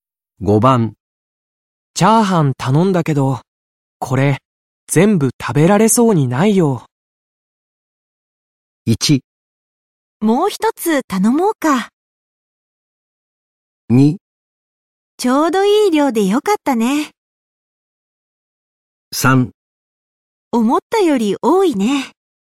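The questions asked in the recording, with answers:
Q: チャーハン頼んだけどこれ全部食べられそうにないよ。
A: 3: 思ったより多いね。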